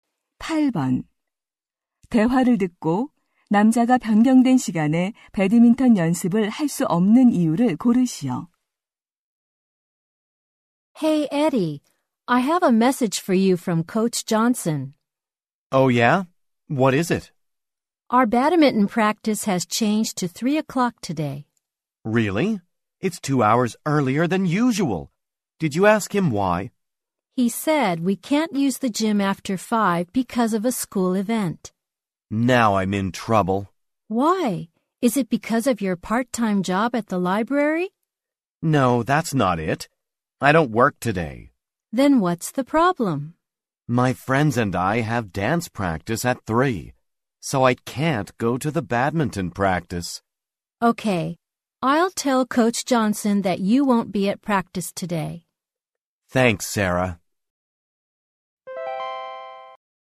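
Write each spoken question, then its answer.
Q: 대화를 듣고 남자가 변경된 시간에 배드민턴 연습을 할 수 없는 이유를 고르시오.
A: 친구들과 댄스 연습이 있어서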